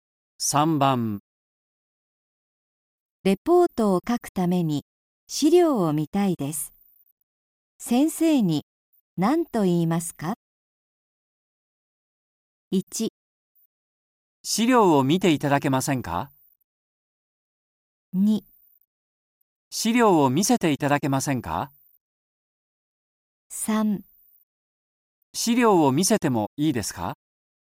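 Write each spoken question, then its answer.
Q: レポートを書くために資料を見たいです。先生に何と言いますか?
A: 2: 資料を見せていただけませんか?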